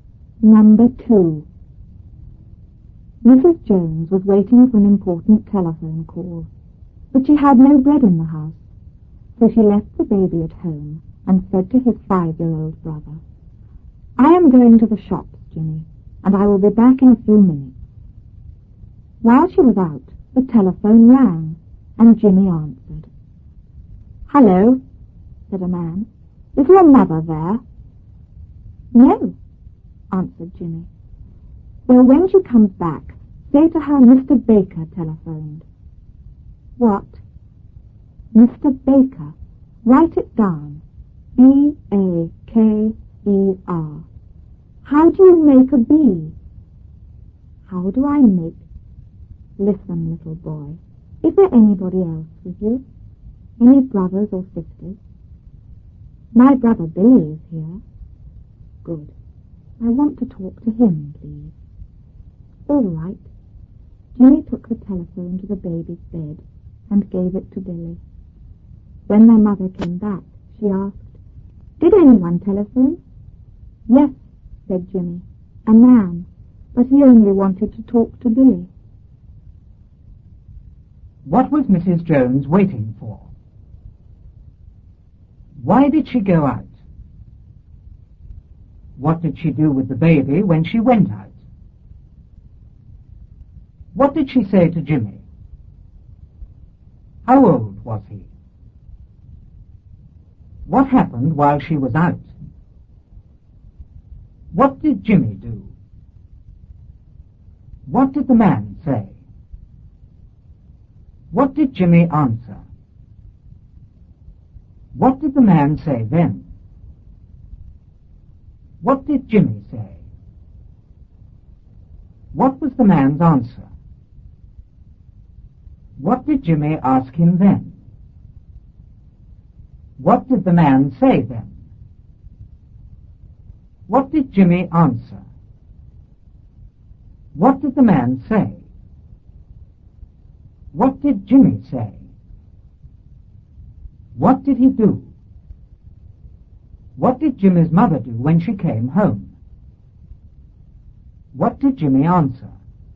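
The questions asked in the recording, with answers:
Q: What was Mrs. Jones waiting for?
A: An important telephone call

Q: Why did she go out?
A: She had no bread in the house

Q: What did she do with the baby when she went out?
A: She left him at home

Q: What did she say to Jimmy?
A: I am going to the shops, Jimmy, and I will be back in a few minutes.

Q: How old was he?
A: Five years old

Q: What happened while she was out?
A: The telephone rang

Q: What did Jimmy do?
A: He answered the telephone

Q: What did Jimmy's mother do when she came home?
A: She asked if anyone had telephoned

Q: What did Jimmy answer?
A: A man, but he only wanted to talk to Billy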